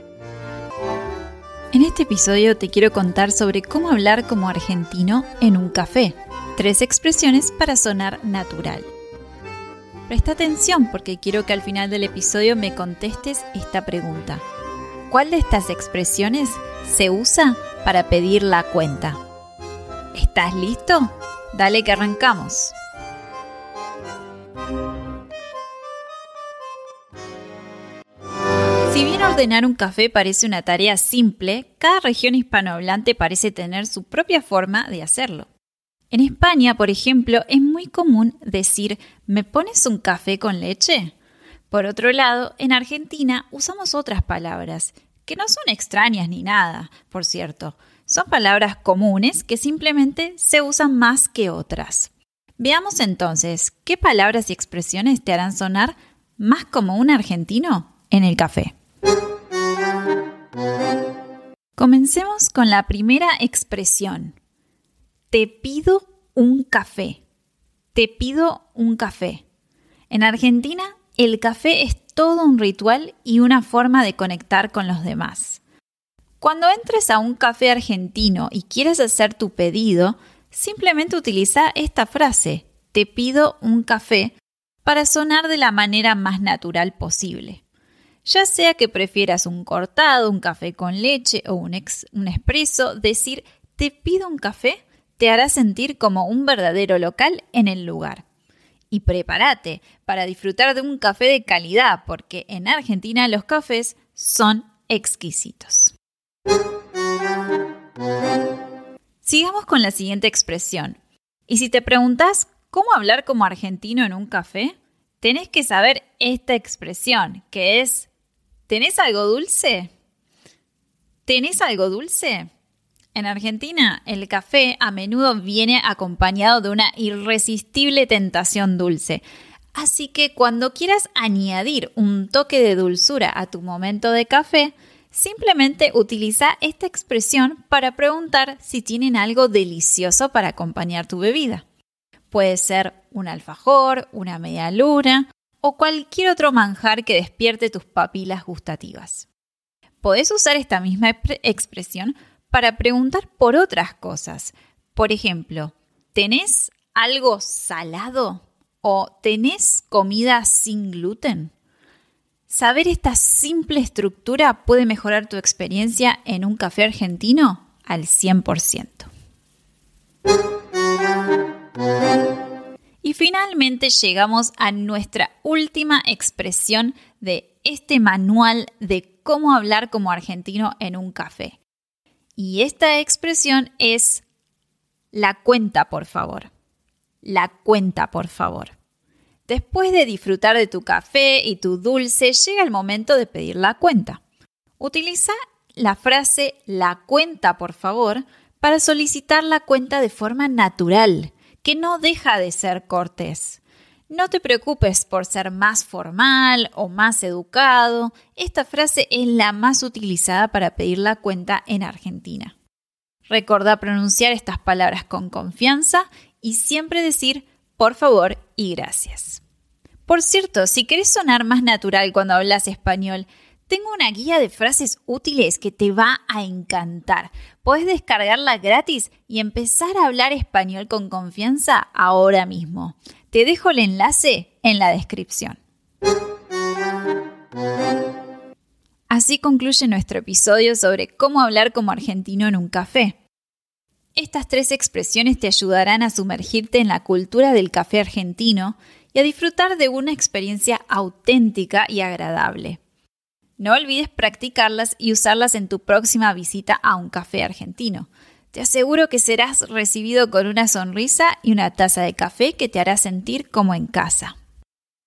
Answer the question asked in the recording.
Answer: la expresión que usamos para pedir la cuenta es la cuenta, por favor.